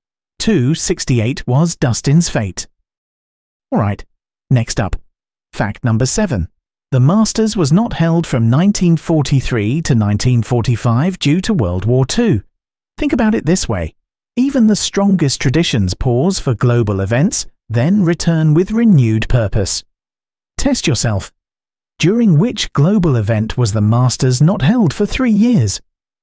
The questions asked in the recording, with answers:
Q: During which global event was the Masters not held for 3 years?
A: Correct answer, World War II.